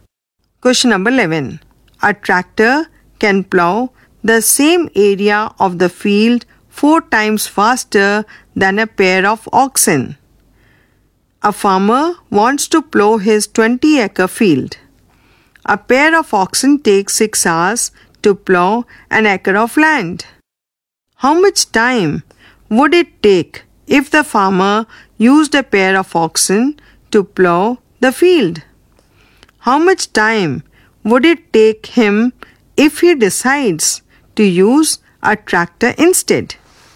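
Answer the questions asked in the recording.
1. 120 hours
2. 30 hours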